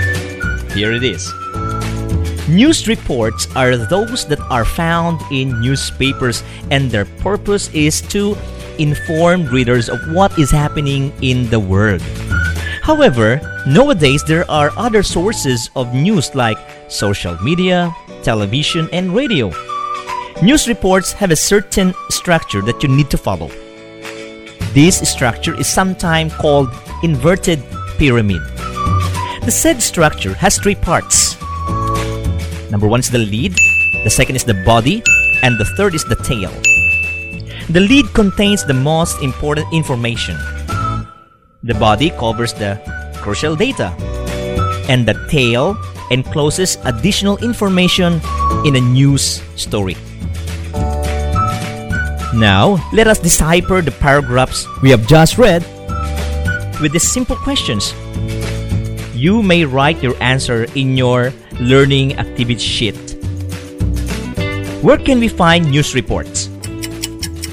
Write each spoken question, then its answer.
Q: Where can we find news reports?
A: News are usually found from newspapers.